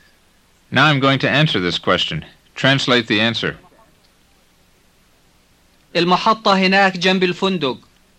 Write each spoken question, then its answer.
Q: Translate the answer.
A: The station is over there next to the hotel.